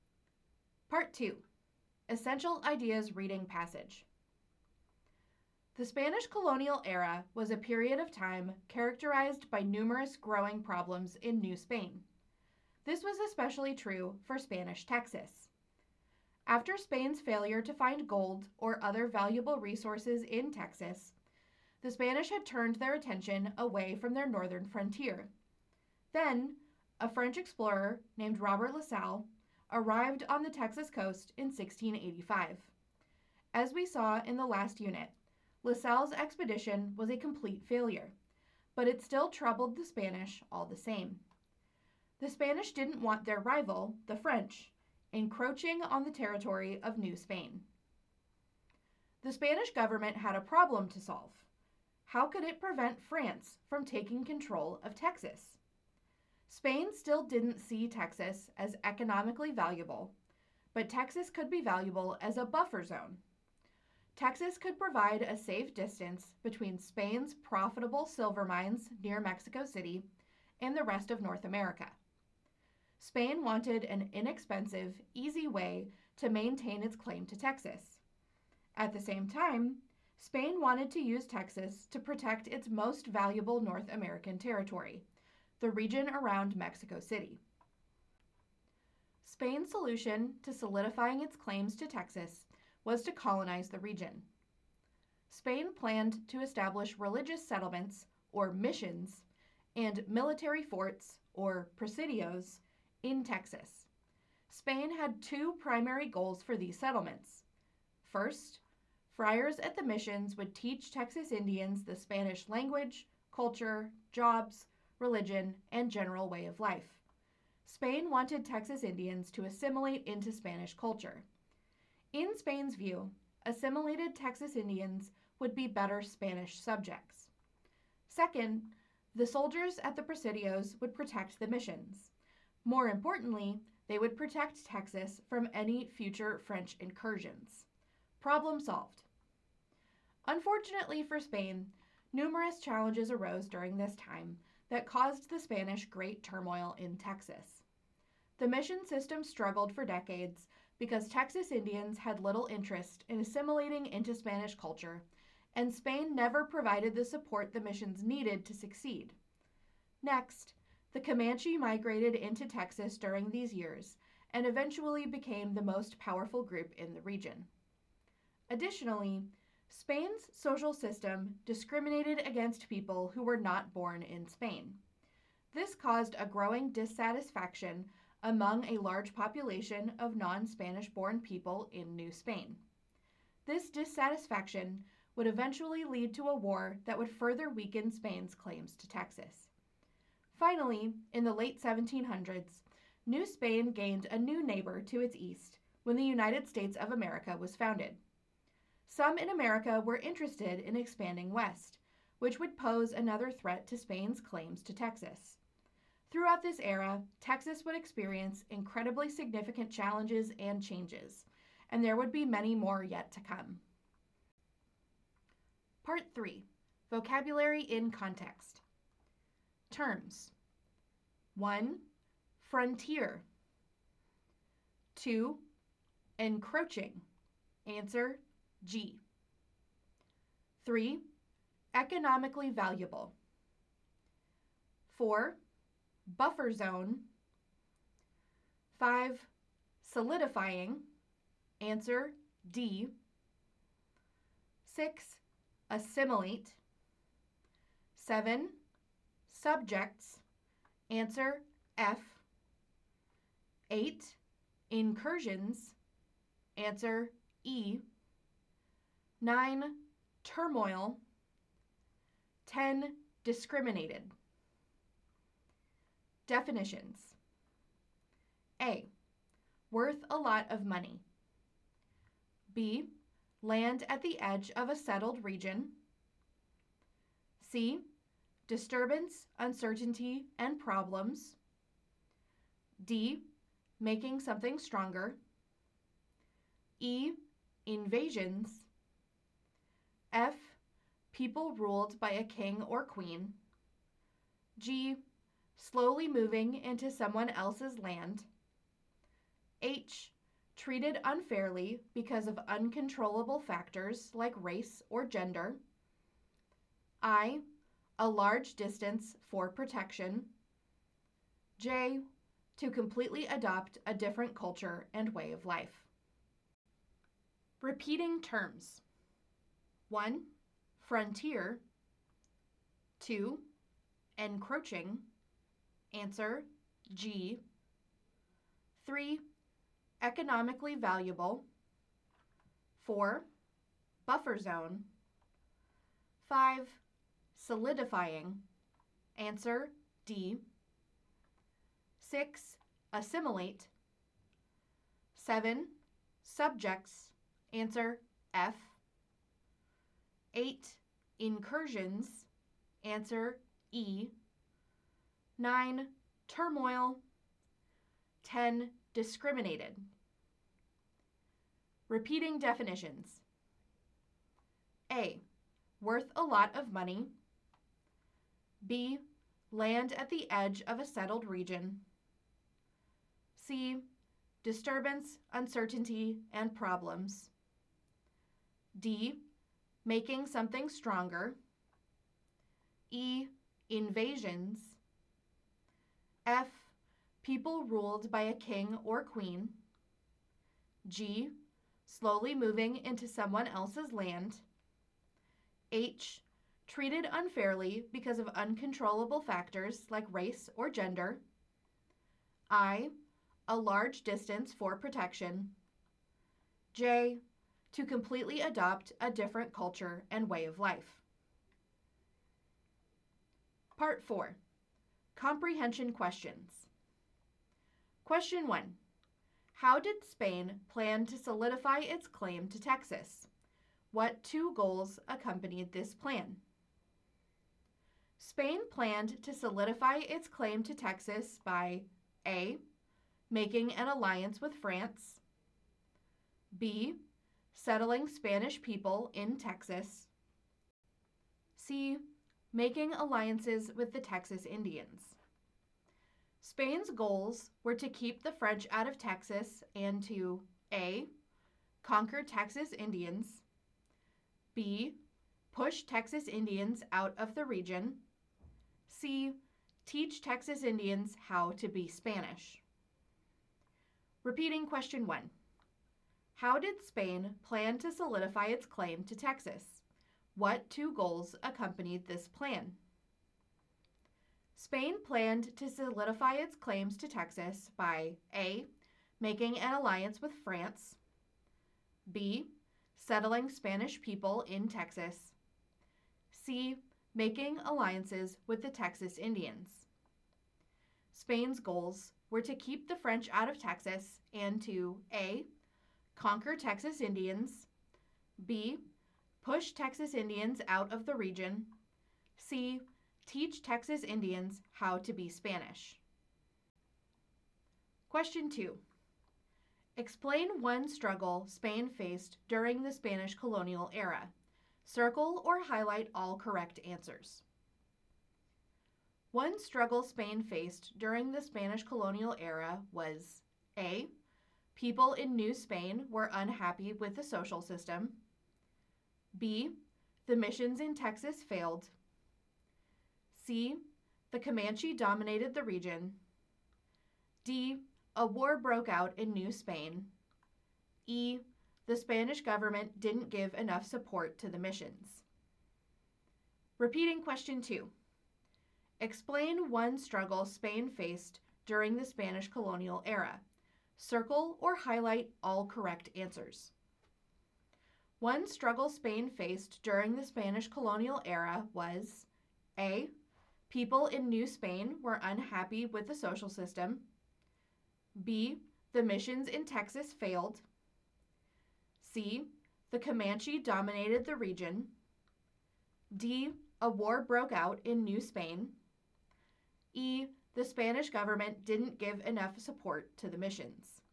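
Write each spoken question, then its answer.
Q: How did Spain plan to solidify its claim to Texas? What two goals accompanied this plan?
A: B: settling Spanish people in Texas; C: teach Texas Indians how to be Spanish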